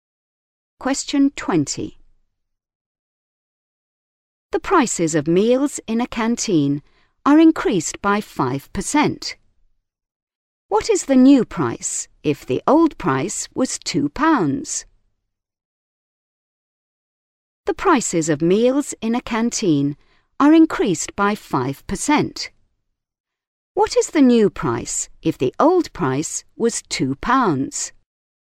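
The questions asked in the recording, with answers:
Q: What is the new price if the old price was £2?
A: £2.10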